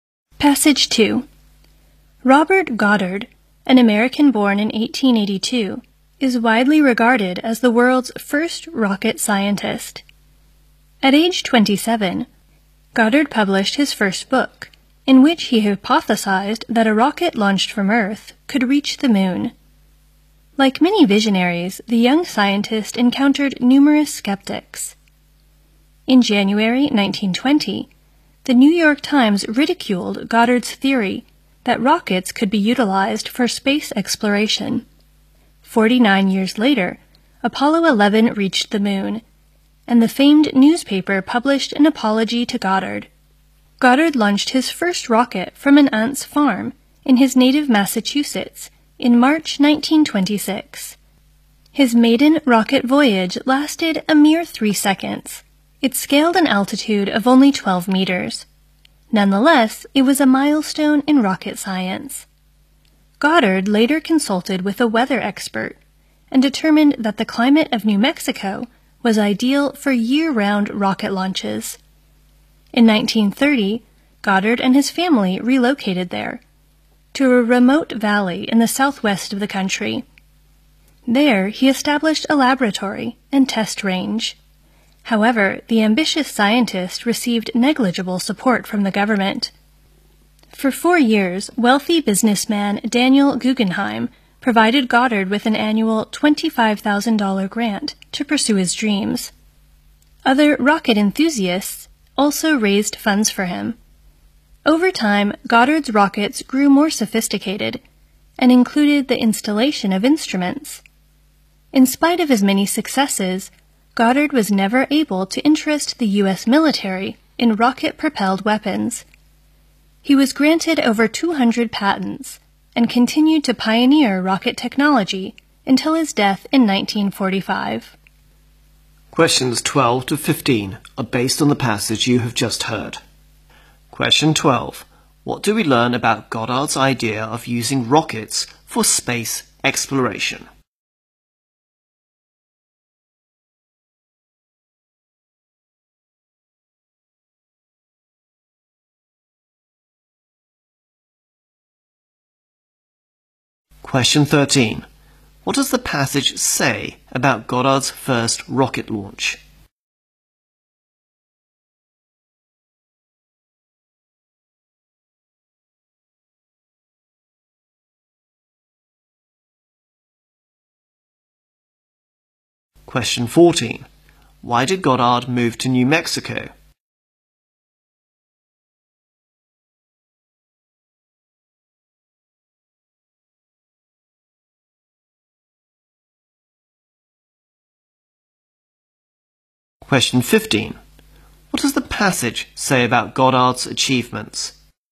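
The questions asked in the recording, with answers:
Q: What do we learn about Goddard's idea of using rockets for space exploration?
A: The New York Times made fun of it at first, then apologized 49 years later.

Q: What does the passage say about Goddard's first rocket launch?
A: It lasted only 3 seconds and reached only 12 meters, but it was a milestone.

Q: Why did Goddard move to New Mexico?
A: Its climate was ideal for launching rockets all year round.

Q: What does the passage say about Goddard's achievements?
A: He was granted over 200 patents and kept pioneering rocket technology until he died.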